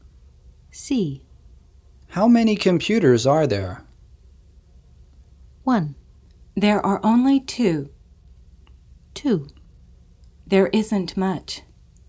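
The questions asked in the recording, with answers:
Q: How many computers are there?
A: 1: There are only 2.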